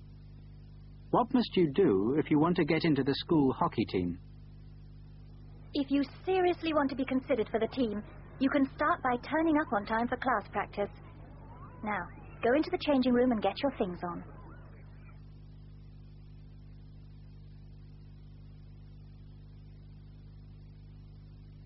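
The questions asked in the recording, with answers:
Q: What must you do if you want to get into the school hockey team?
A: Turn up on time for class practice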